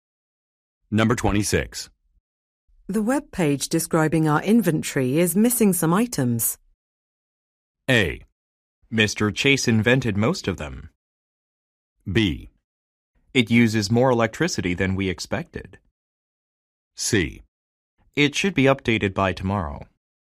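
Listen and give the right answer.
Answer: C: It should be updated by tomorrow.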